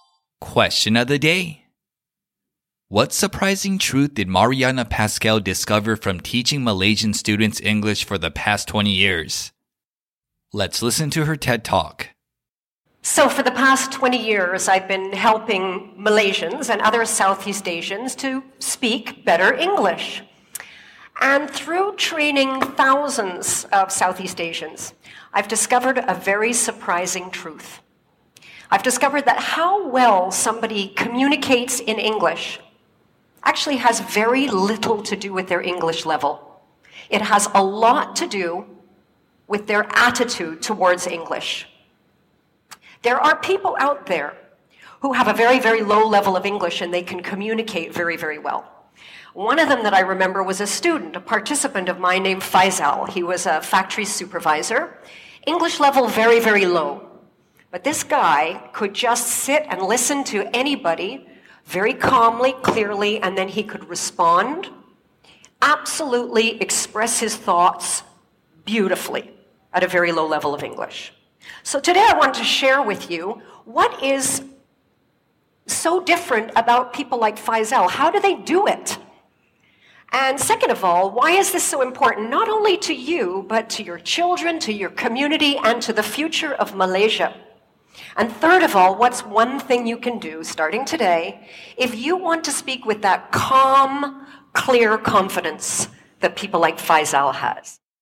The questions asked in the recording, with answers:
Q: What surprising truth did Mariana Pascal discover from teaching Malaysian students English for the past 20 years?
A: She discovered that how well somebody communicates in a new language has very little to do with their language level and a lot more to do with their attitude.